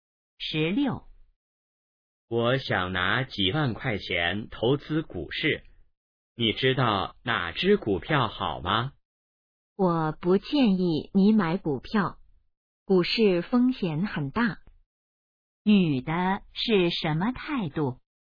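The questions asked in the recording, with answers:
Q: 女的是什么态度?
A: 不建议买股票(反对)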